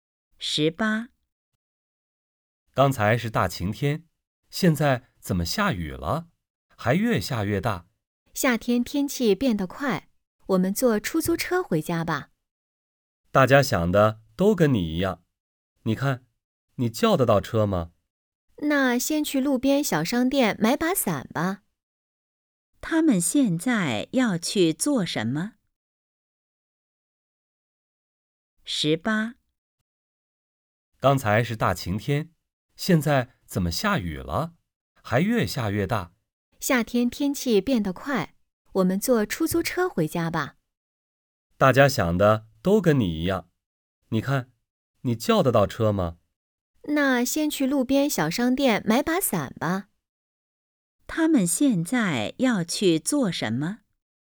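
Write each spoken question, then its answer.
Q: 他们现在要去做什么?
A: 去商店买伞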